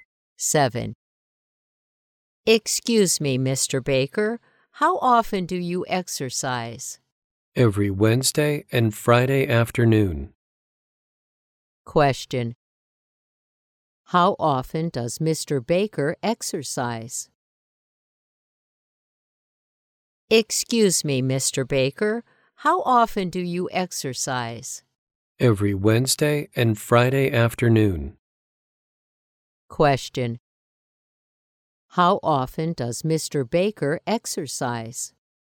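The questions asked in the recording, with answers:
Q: How often does Mr. Baker exercise?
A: Every Wednesday and Friday afternoon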